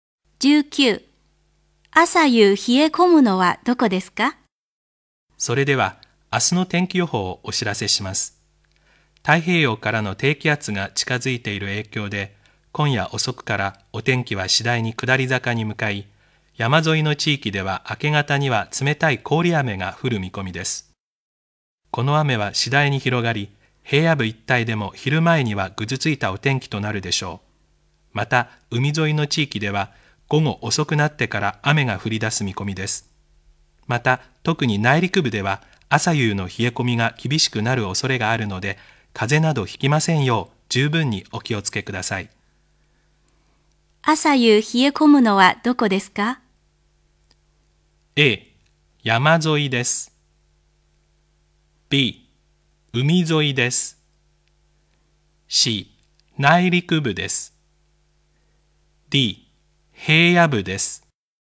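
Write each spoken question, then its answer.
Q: 朝夕冷え込むのはどこですか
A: C: 内陸部です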